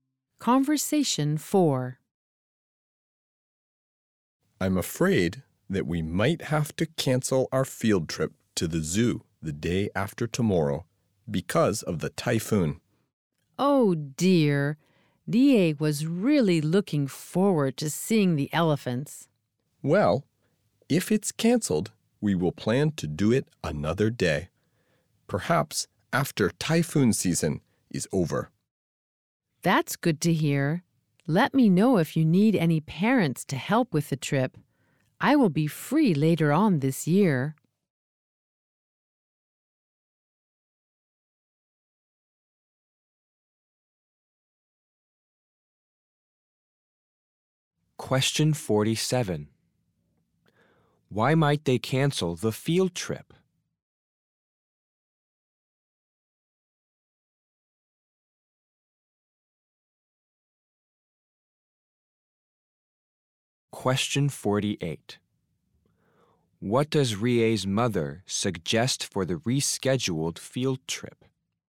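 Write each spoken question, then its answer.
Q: Why might they cancel the field trip?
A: Because of the typhoon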